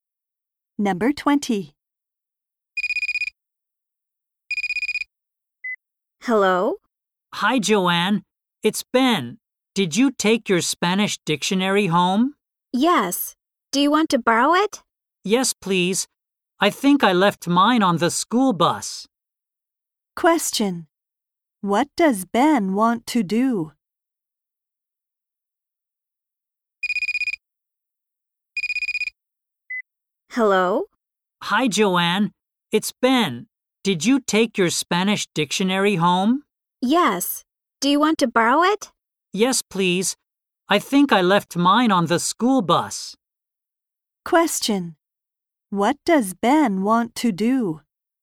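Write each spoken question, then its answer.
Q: What does Ben want to do?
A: Borrow Joanne's Spanish dictionary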